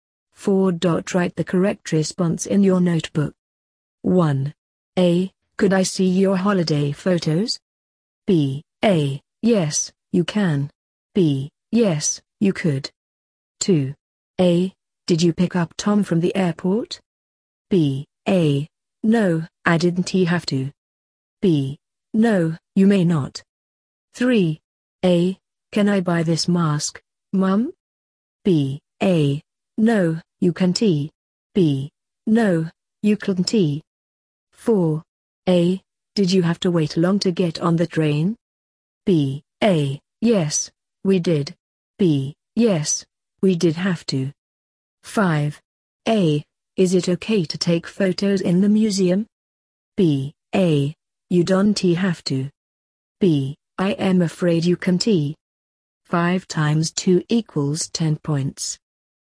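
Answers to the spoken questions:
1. A: Yes, you can.
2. A: No, I didn't have to.
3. A: No, you can't.
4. A: Yes, we did.
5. B: I am afraid you can't.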